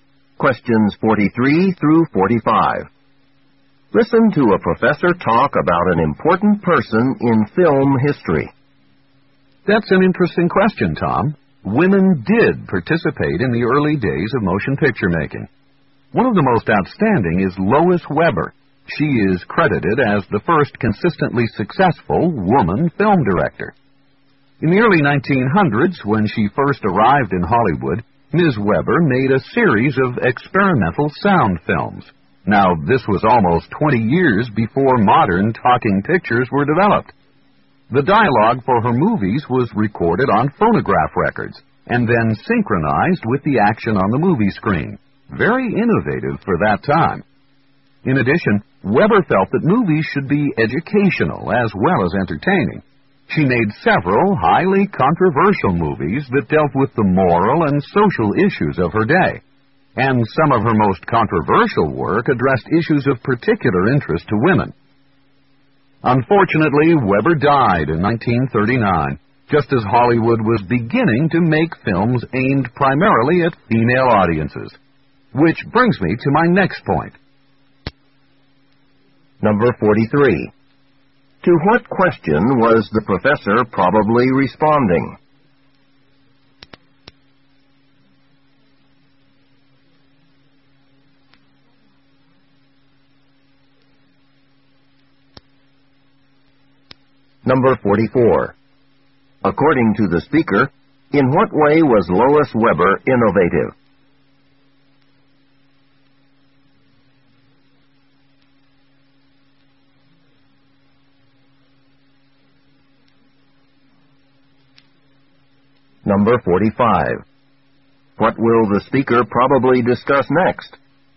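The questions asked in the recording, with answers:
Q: To what question was the professor probably responding?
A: Whether women took part in early motion picture making

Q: According to the speaker, in what way was Lois Weber innovative?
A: She made experimental sound films about 20 years before modern talking pictures

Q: What will the speaker probably discuss next?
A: Hollywood films aimed mainly at female audiences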